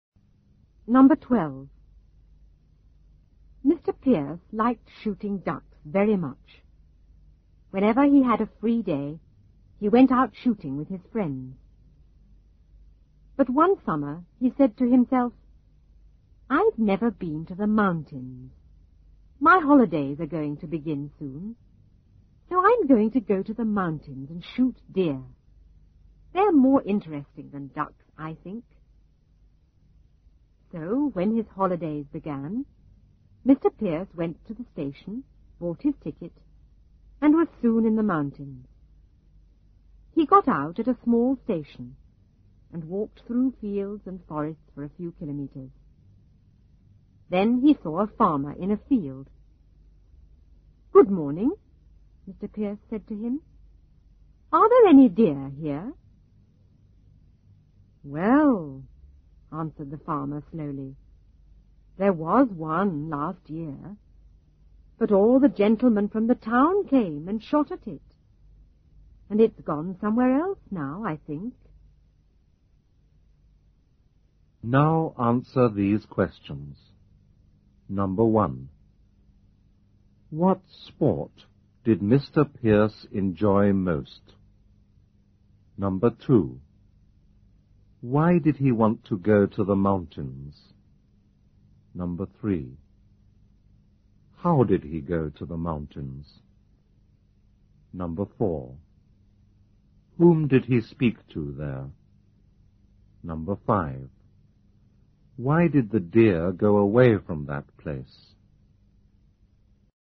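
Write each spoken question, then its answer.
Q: What sport did Mr. Pierce enjoy most?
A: Shooting ducks

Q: Why did he want to go to the mountains?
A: He had never been there and wanted to shoot deer, which he thought more interesting than ducks

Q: How did he go to the mountains?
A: By train

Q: Whom did he speak to there?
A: A farmer

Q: Why did the deer go away from that place?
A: Because all the gentlemen from the town came and shot at it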